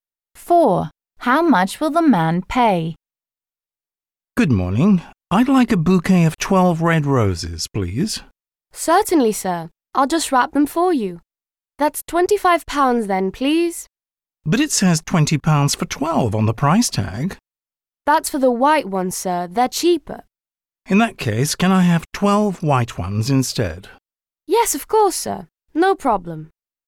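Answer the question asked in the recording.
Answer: £20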